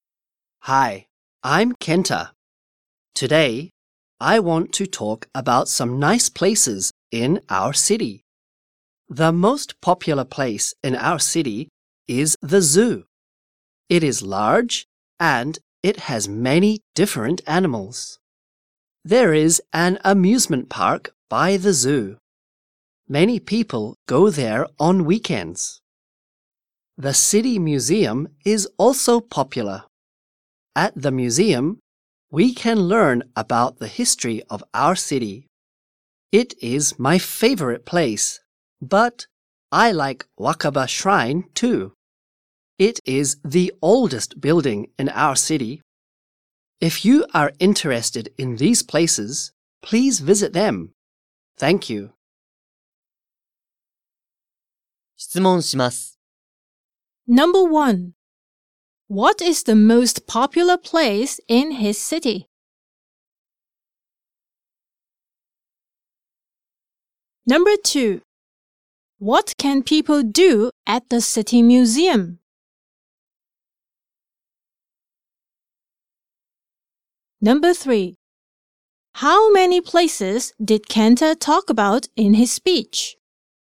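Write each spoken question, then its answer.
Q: What is the most popular place in his city?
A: The zoo.

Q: What can people do at the city museum?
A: They can learn about the history of the city.

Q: How many places did Kenta talk about in his speech?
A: Four.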